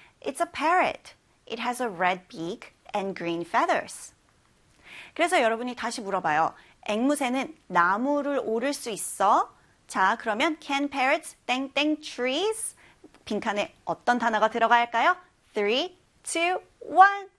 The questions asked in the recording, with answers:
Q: 빈칸에 어떤 단어가 들어갈까요?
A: climb가 들어가야 돼요.